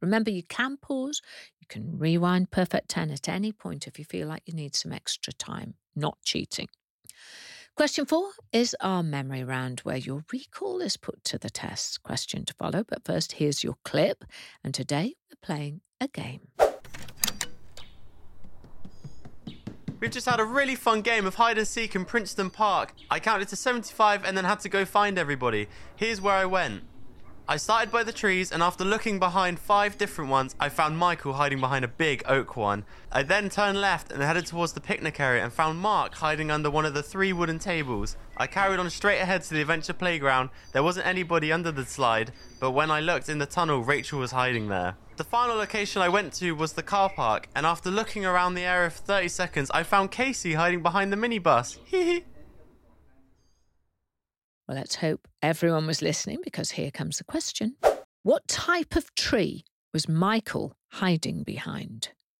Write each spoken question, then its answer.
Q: What type of tree was Michael hiding behind?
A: If you were paying attention, you would know he hid behind an oak tree.